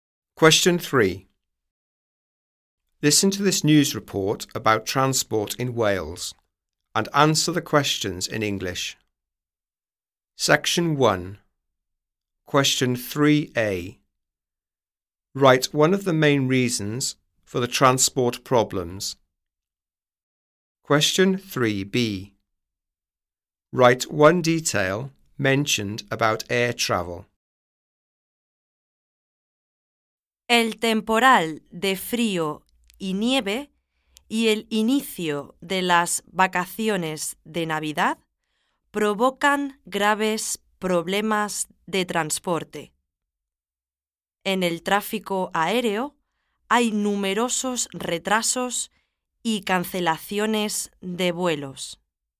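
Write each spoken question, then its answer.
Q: Write one of the main reasons for the transport problems.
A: Cold weather and snow / start of Christmas holidays

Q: Write one detail mentioned about air travel.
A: Numerous delays and flight cancellations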